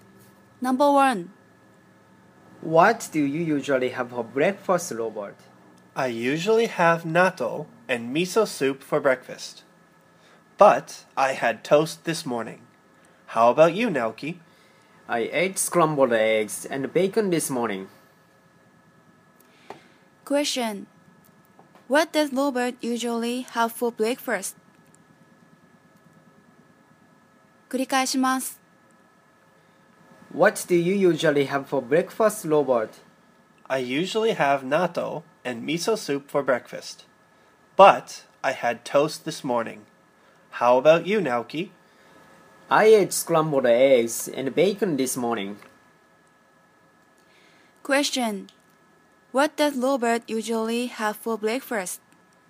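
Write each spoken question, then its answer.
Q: What does Robert usually have for breakfast?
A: Natto and miso soup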